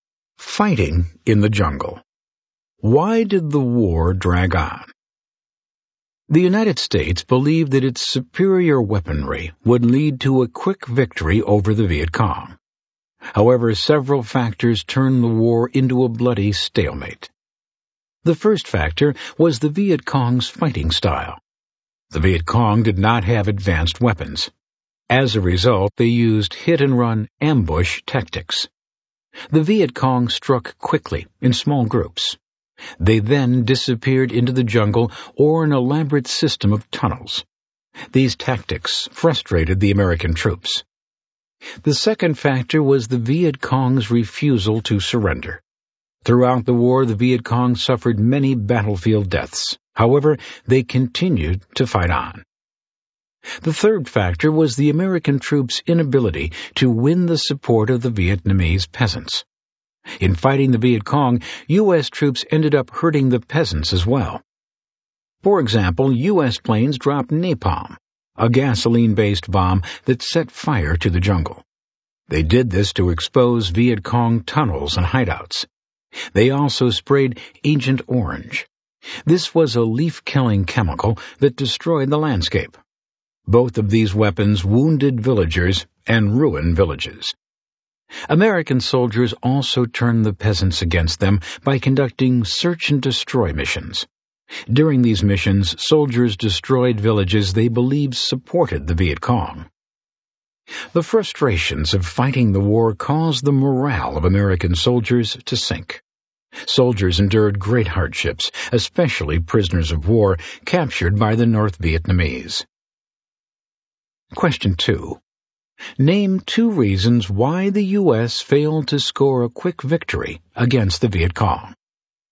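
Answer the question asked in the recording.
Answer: The Viet Cong's hit-and-run tactics and refusal to surrender; U.S. troops failed to win peasant support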